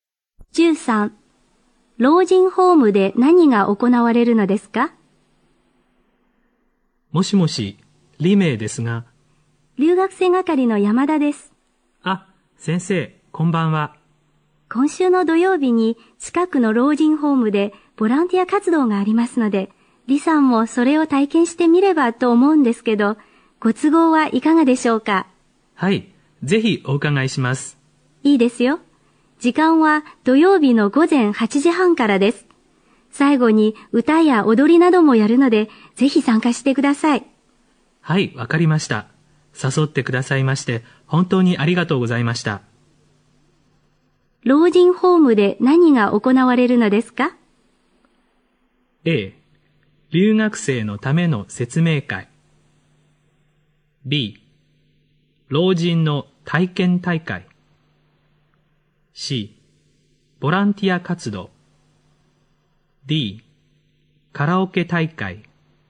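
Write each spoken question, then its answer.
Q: 老人ホームで何が行われるのですか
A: C: ボランティア活動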